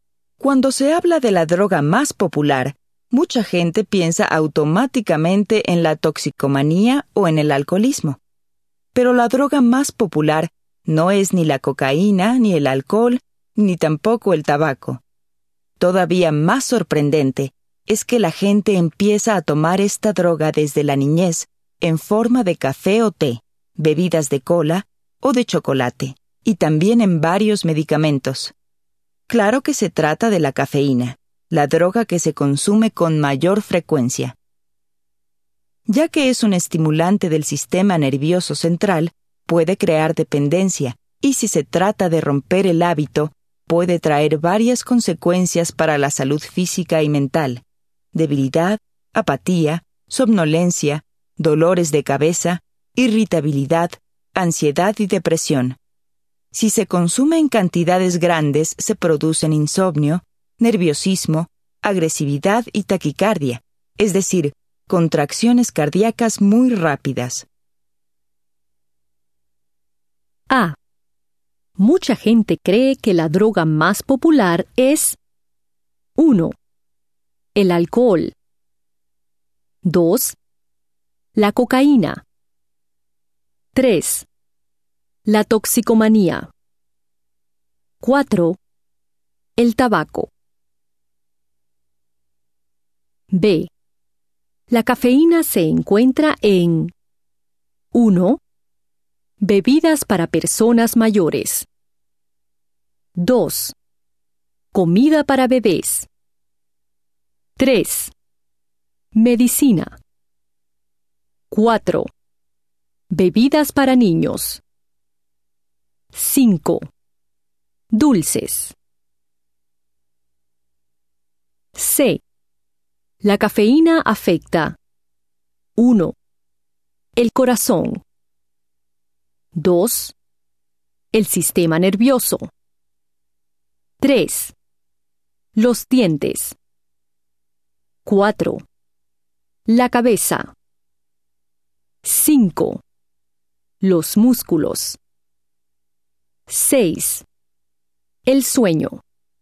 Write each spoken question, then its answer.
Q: La cafeína afecta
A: C. 1, 2, 4 y 6.